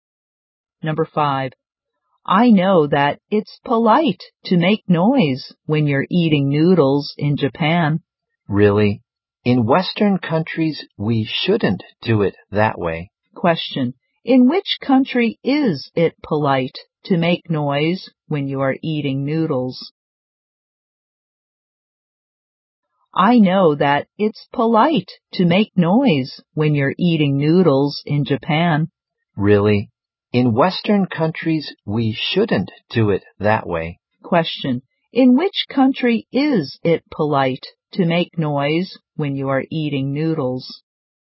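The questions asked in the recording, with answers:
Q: in which country is it polite to make noise when you are eating noodles?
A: Japan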